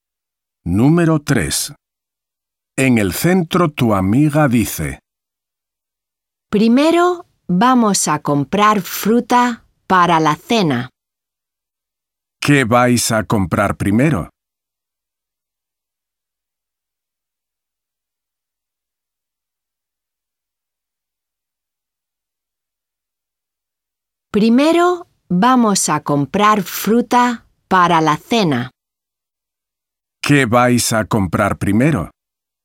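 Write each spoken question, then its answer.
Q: ¿Qué vais a comprar primero?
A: fruta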